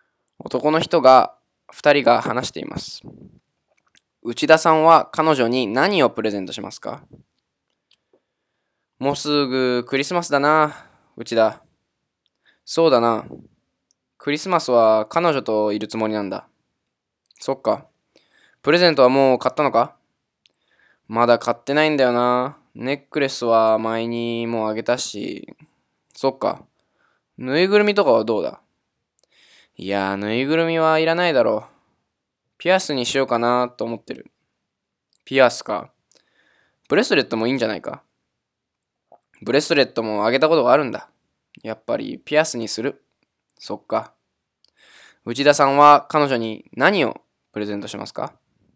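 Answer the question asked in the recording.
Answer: ピアス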